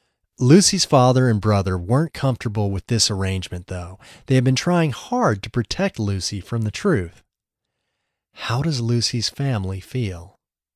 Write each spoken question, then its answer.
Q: How does Lucy's family feel?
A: They don't feel comfortable with the arrangement.